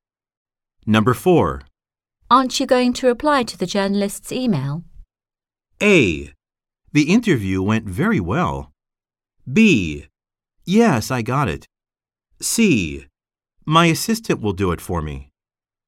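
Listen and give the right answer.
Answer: C: My assistant will do it for me.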